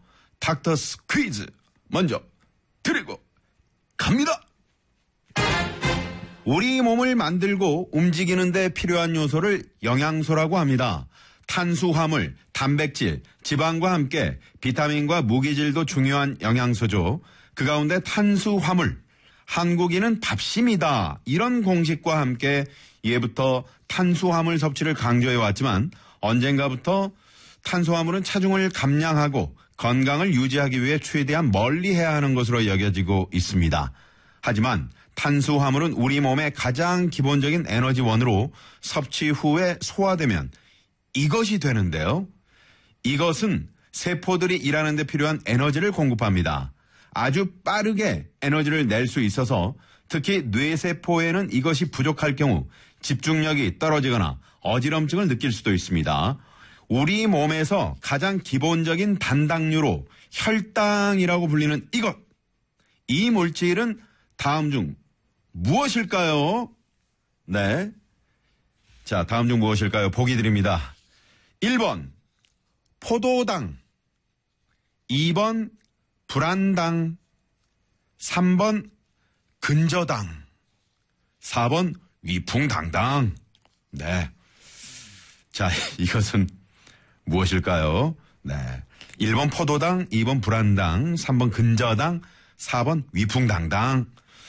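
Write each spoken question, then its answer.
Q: 이 물질은 다음 중 무엇일까요?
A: 1번: 포도당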